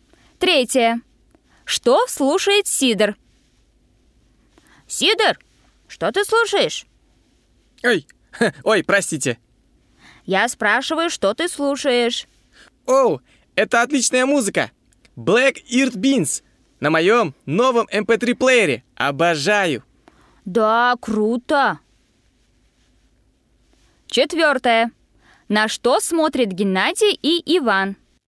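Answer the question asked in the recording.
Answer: музыку на MP3-плеере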